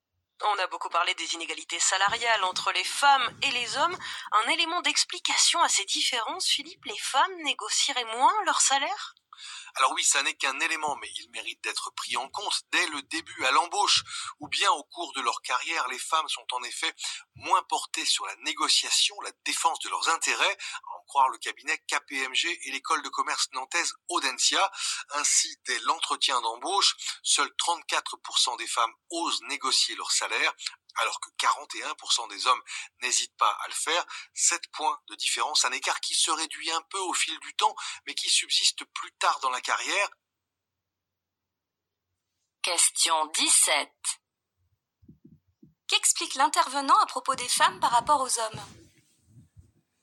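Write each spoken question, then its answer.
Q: Qu'explique l'intervenant à propos des femmes par rapport aux hommes ?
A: Elles négocient moins leur salaire que les hommes (34 % contre 41 % à l'embauche).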